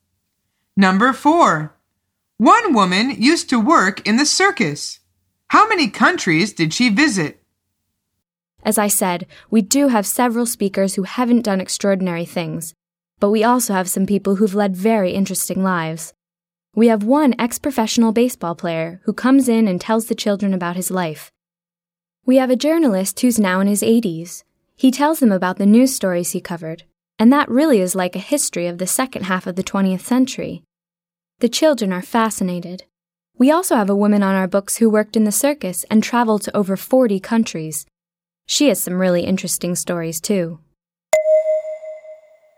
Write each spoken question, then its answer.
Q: How many countries did she visit?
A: The answer is over 40.